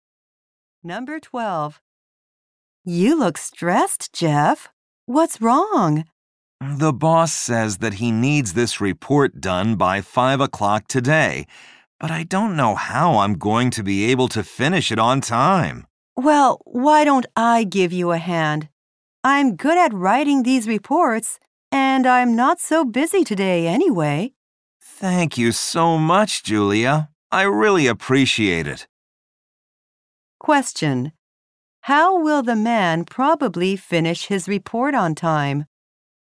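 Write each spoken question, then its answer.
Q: How will the man probably finish his report on time?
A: Julia will help him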